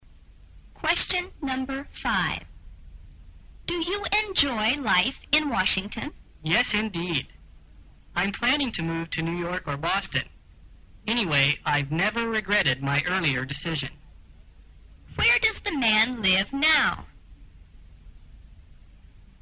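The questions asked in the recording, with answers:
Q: Where does the man live now?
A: In Washington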